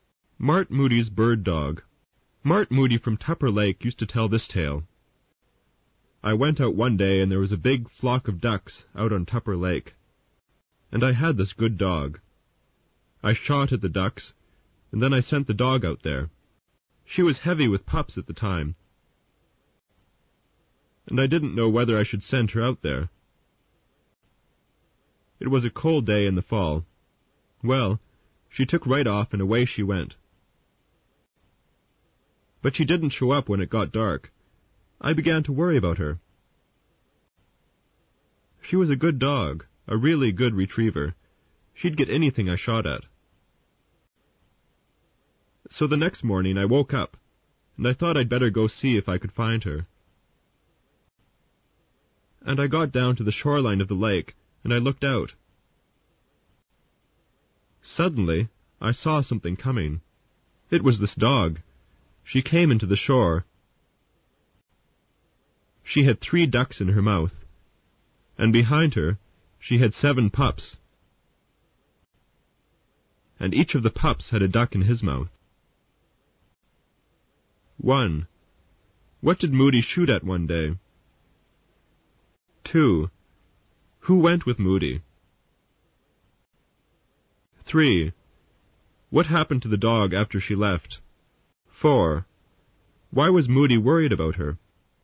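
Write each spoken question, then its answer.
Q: What did Moody shoot at one day?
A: A big flock of ducks on Tupper Lake

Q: Who went with Moody?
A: His dog

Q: What happened to the dog after she left?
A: She didn't come back until the next morning, returning with 3 ducks and 7 pups each carrying a duck

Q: Why was Moody worried about her?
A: She didn't come back when it got dark, and she was heavy with pups on a cold day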